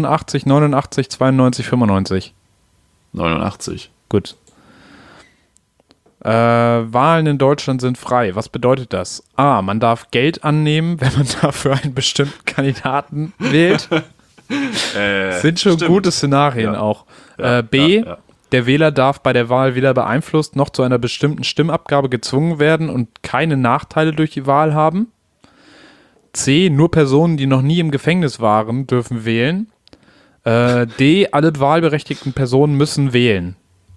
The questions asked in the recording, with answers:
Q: Was bedeutet das?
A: Ja, B.